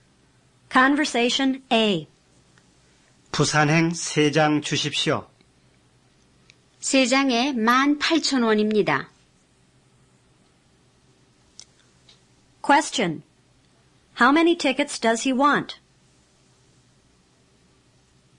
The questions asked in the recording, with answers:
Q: How many tickets does he want?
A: He wants three tickets.